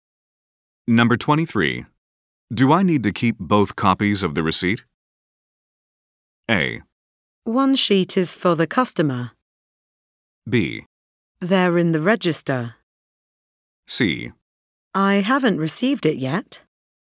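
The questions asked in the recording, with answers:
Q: Do I need to keep both copies of the receipt?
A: A: One sheet is for the customer.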